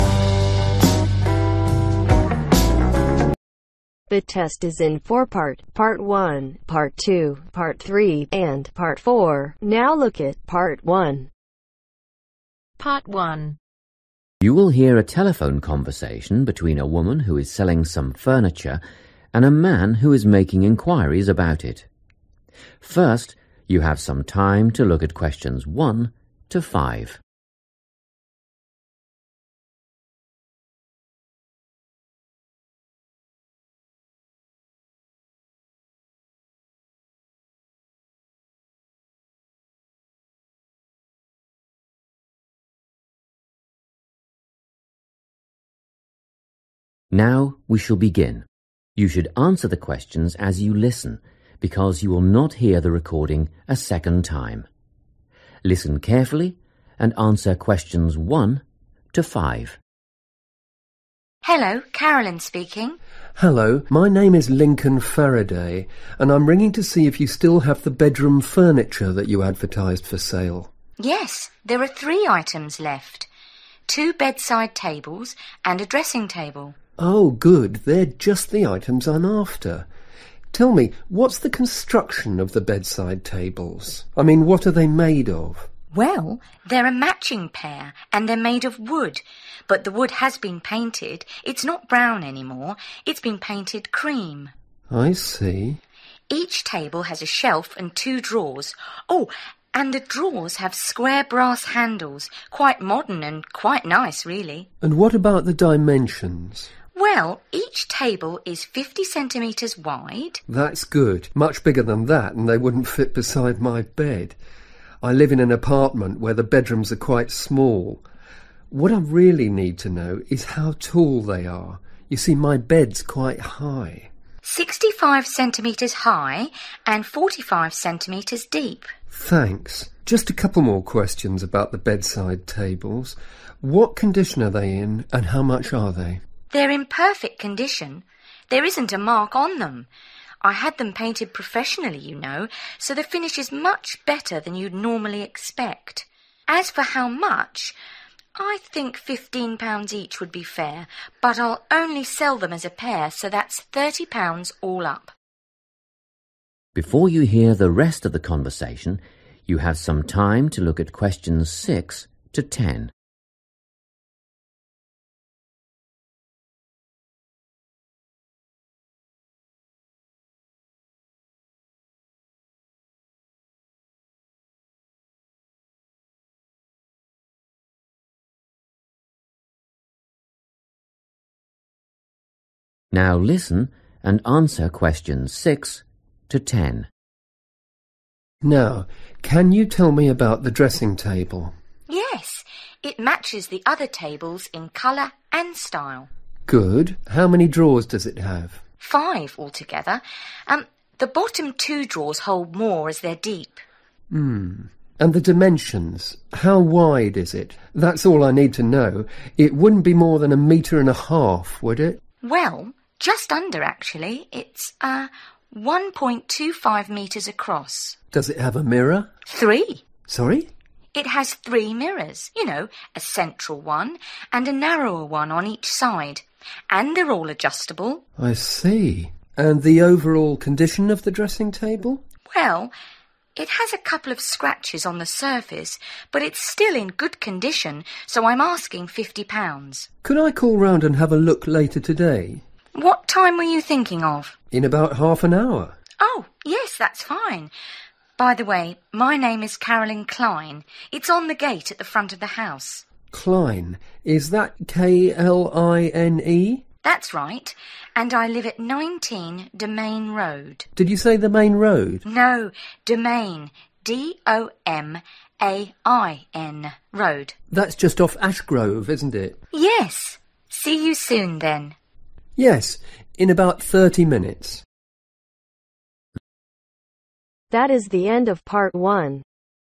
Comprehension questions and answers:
Complete the notes below. Write ONE WORD AND/OR A NUMBER for each answer.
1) Color: (1) ............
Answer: Cream

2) Drawers: two (in each table) handles made of (2) ............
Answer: Brass

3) Height: (3) ............ cm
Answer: 65

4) Condition: (4) ............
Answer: Perfect

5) Price: (5) ............ (for both)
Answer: £30

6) Drawers: five (two are (6) ............ )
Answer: Deep

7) Width: (7) ............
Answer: 1.25 m

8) Mirrors: three: one large, two small (all (8) ............ )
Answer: Adjustable

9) Price: (9) ............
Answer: £50

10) Address: 19 (10) ............ Road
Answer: Domain